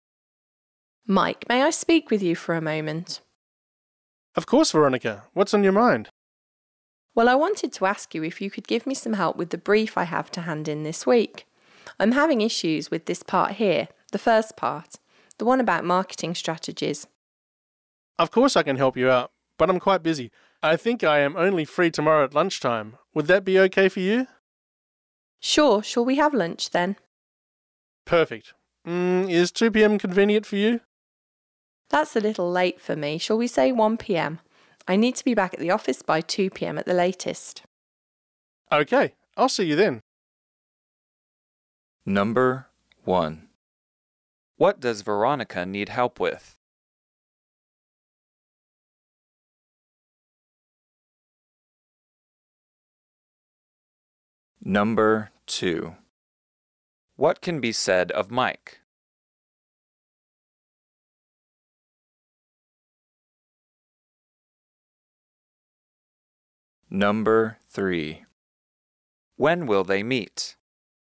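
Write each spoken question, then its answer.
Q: What does Veronica need help with?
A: The first part of her brief, about marketing strategies

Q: When will they meet?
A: Tomorrow at 1 p.m., for lunch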